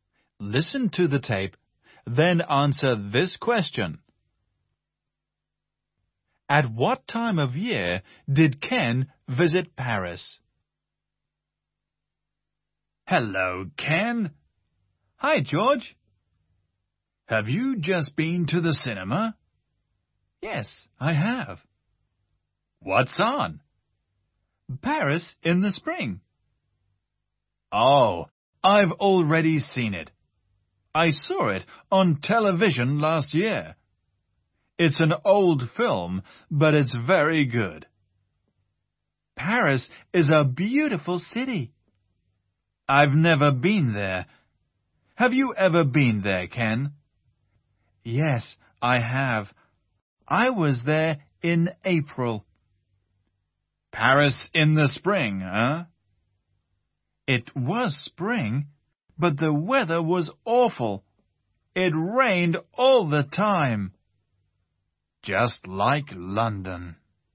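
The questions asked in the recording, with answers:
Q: At what time of year did Ken visit Paris?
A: In the spring (in April)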